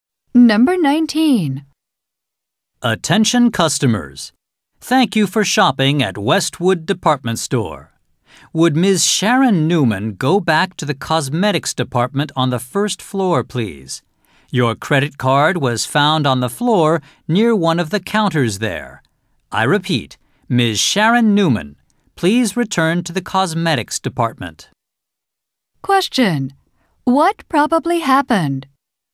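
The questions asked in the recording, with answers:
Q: What probably happened?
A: Ms. Sharon Newman dropped her credit card near a counter in the cosmetics department.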